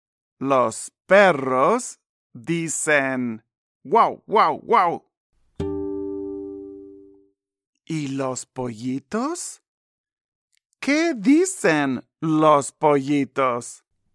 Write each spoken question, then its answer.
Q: ¿Qué dicen los pollitos?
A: Sí, los pollitos dicen pío, pío, pío.